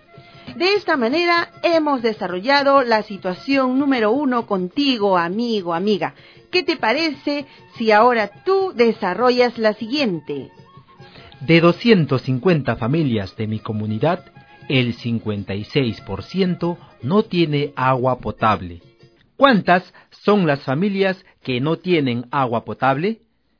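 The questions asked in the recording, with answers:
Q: ¿Cuántas son las familias que no tienen agua potable?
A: 140 familias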